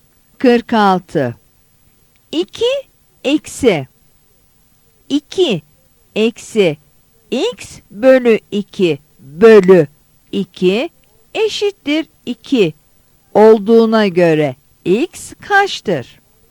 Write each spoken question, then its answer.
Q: 2 eksi 2 eksi x bölü 2 bölü 2 eşittir 2 olduğuna göre x kaçtır?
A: Yanıt A'dır.